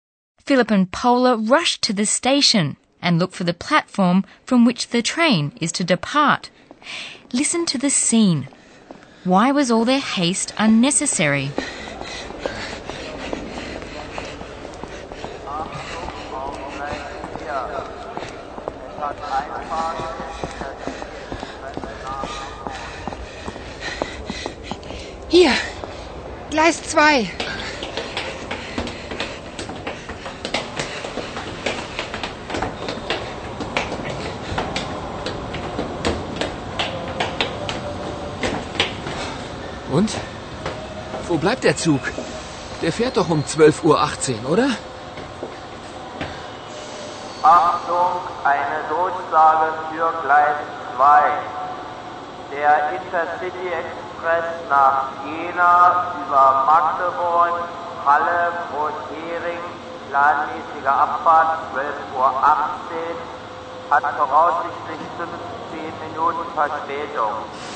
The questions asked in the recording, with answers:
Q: Why was all their haste unnecessary?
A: The train that Paula and Philip want to take to Jena is estimated to be 15 minutes late.